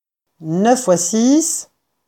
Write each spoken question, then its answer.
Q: 9 fois 6,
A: 54.